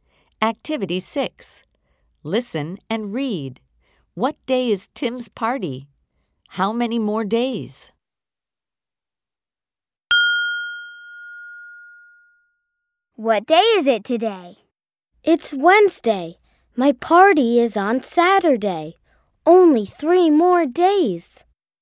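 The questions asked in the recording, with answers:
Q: What day is Tim's party?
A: Saturday

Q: How many more days?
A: 3 more days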